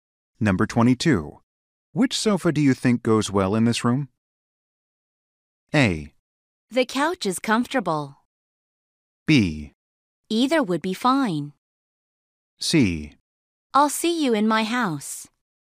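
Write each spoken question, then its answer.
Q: Which sofa do you think goes well in this room?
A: B: Either would be fine.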